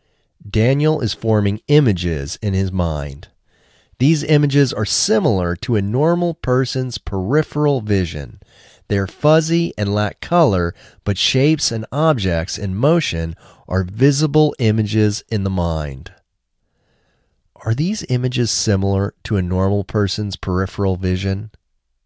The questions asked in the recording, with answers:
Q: Are these images similar to a normal person's peripheral vision?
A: Yes, they are similar to a normal person's peripheral vision.